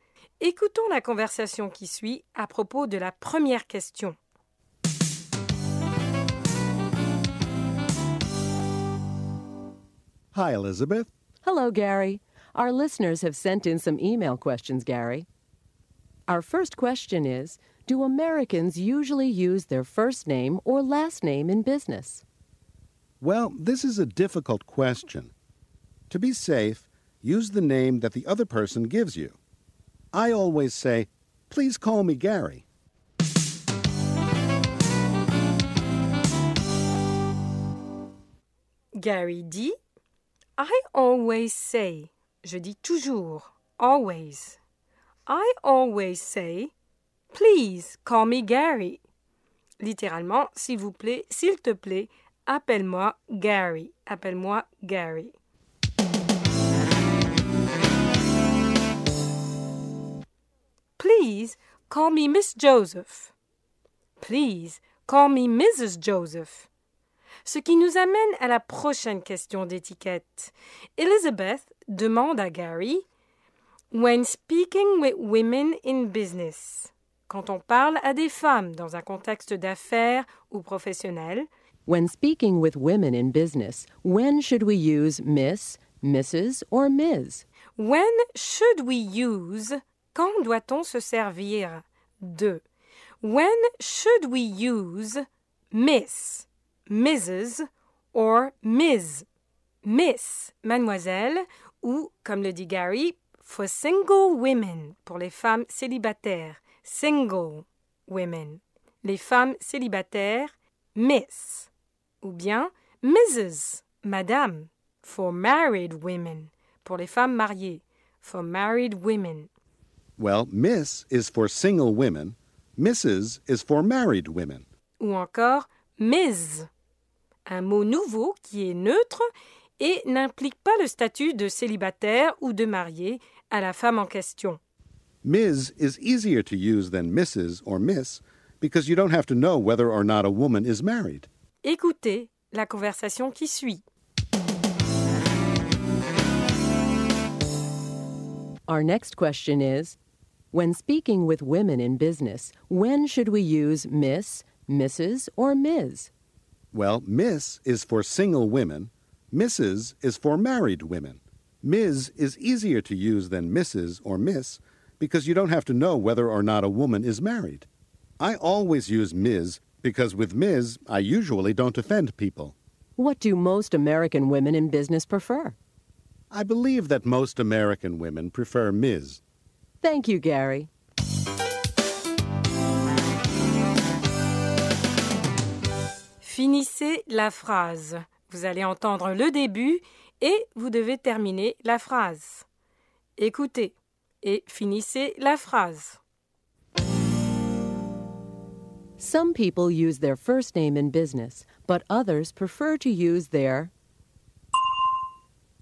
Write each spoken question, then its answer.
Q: Some people use their first name in business, but others prefer to use their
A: last name.